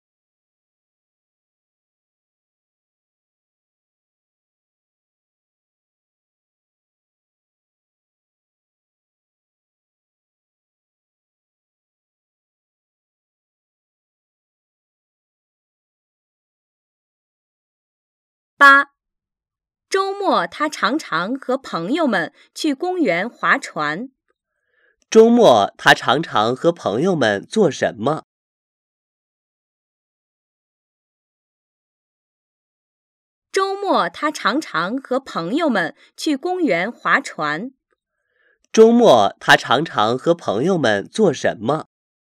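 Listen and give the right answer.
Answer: 去公园划船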